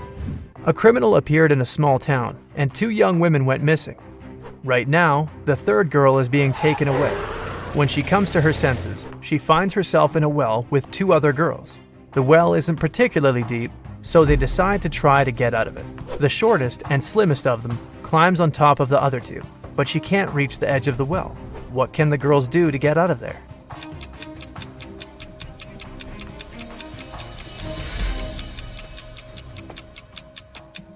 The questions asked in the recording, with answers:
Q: What can the girls do to get out of there?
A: The tallest of the girls should climb on top.